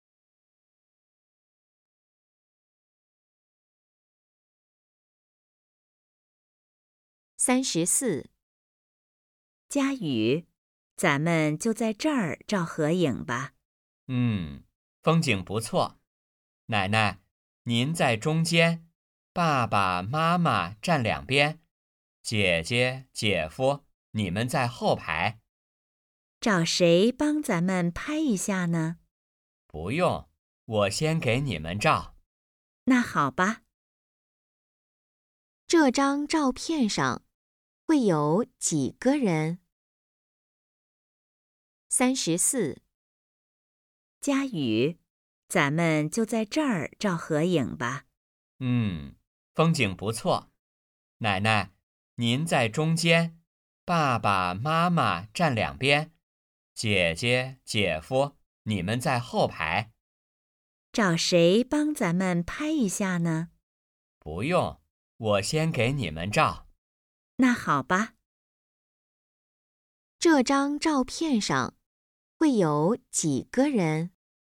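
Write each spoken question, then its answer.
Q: 这张照片上会有几个人?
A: 五个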